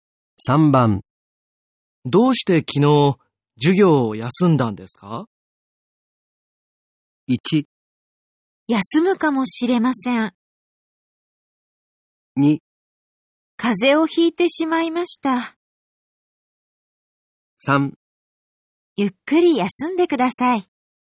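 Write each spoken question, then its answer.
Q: どうして昨日授業を休んだんですか?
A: 2: 風邪をひいてしまいました。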